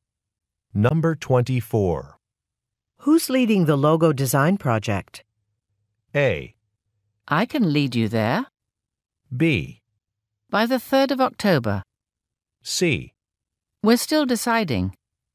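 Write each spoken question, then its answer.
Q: Who's leading the logo design project?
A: C: We're still deciding.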